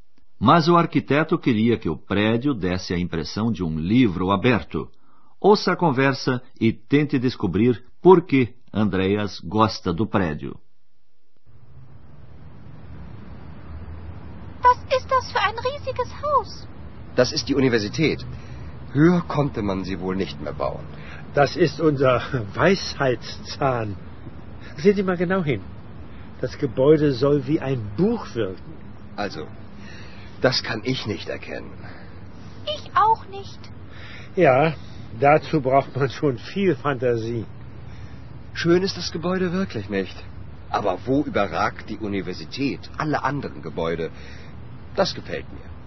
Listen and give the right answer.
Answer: Andreas gostou do prédio da universidade porque ele se destaca dos demais em altura.